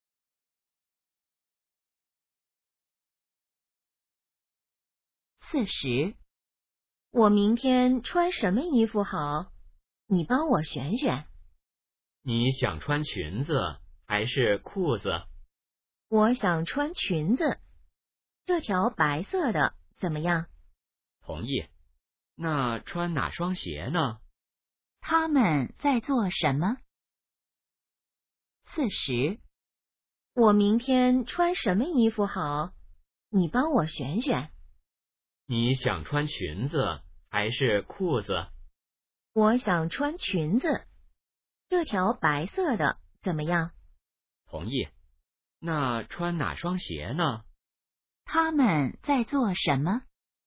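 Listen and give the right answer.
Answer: 选衣服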